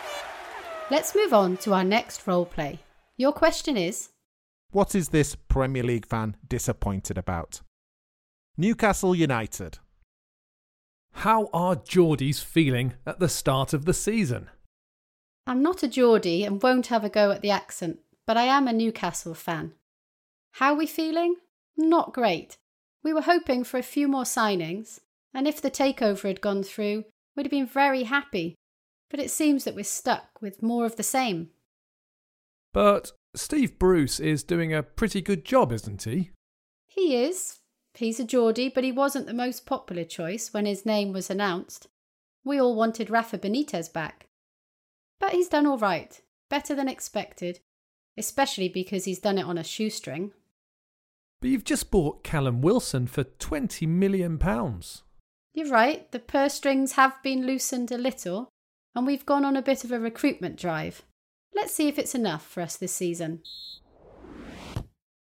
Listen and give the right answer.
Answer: She wishes that Newcastle had spent more money on new transfers.